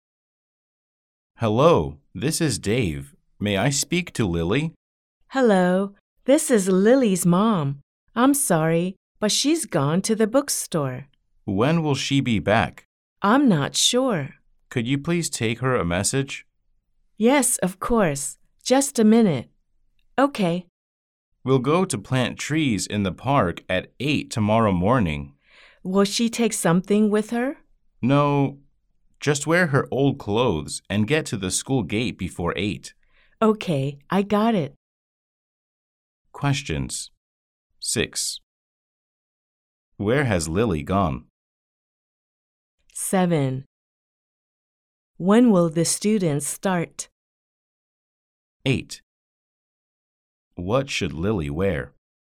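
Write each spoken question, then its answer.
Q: Where has Lily gone?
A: To the bookstore.

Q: When will the students start?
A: At 8 tomorrow morning.

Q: What should Lily wear?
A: Her old clothes.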